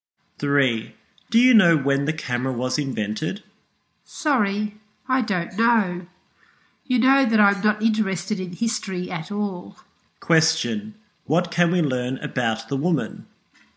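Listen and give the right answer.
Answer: She is not interested in history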